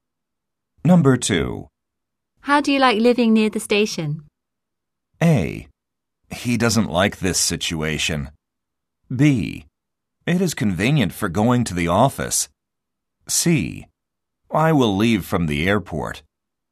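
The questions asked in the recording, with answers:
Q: How do you like living near the station?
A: B: It is convenient for going to the office.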